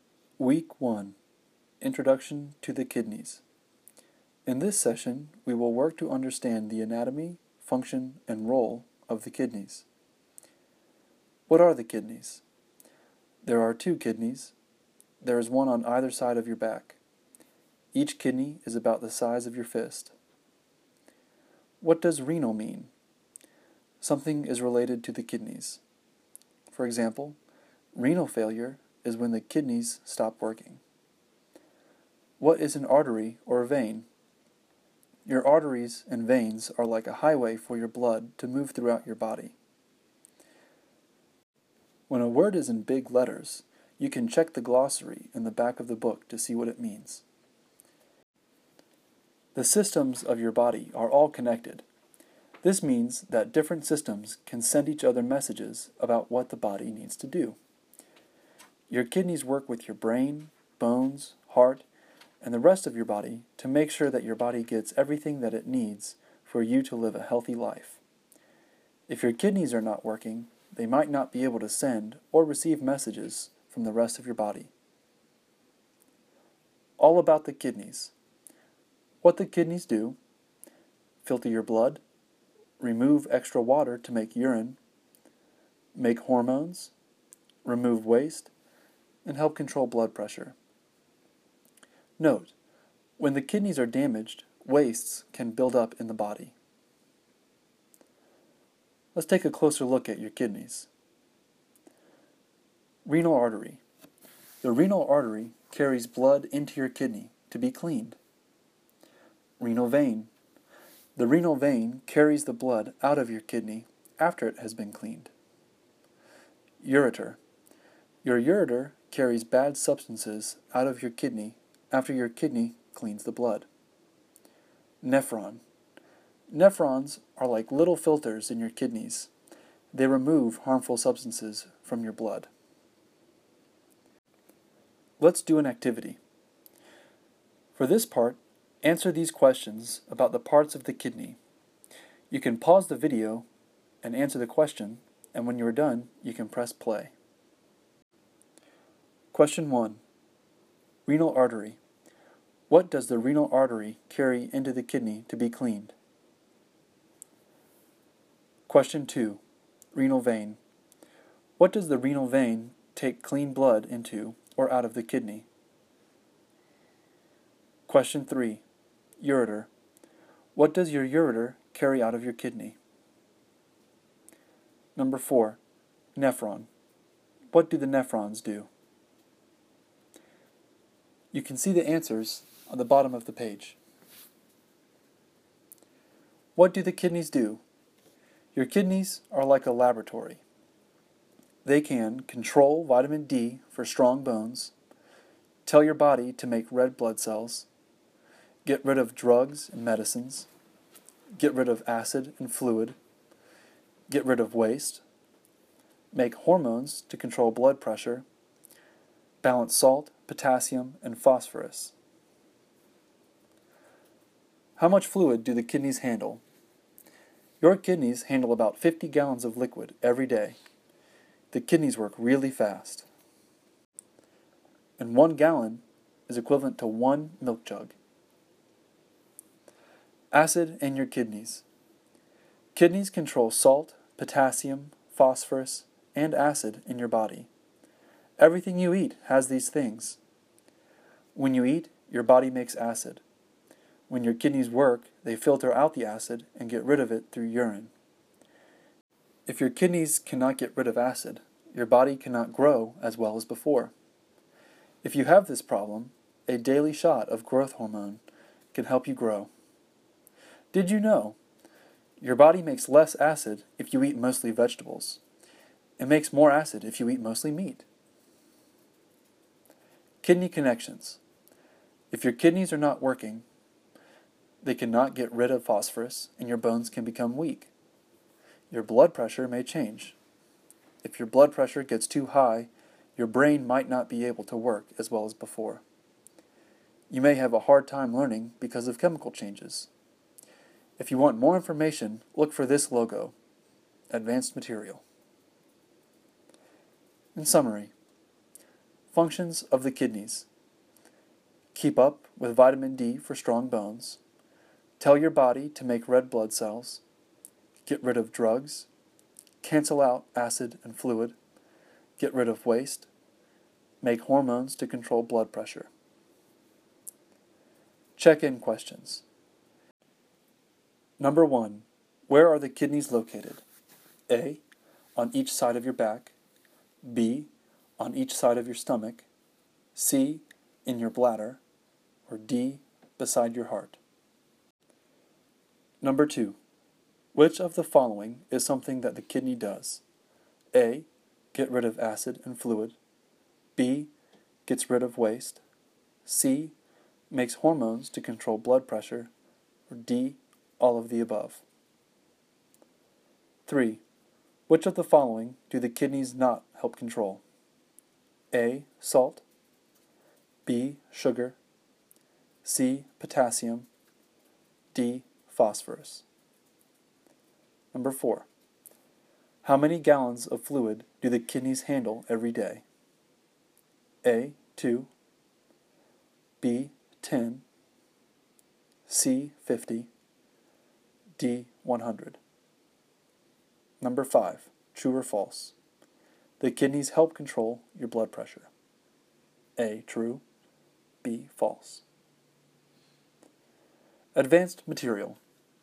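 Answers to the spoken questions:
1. Blood
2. Out of the kidney
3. Bad substances
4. They filter harmful substances from the blood
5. A: On each side of your back.
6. D: All of the above.
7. B: Sugar.
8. C: 50.
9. A: True.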